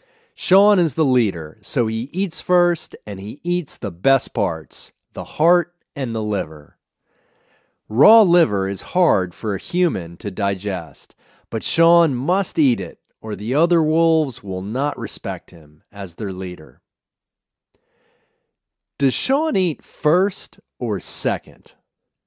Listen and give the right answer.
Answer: Sean eats first.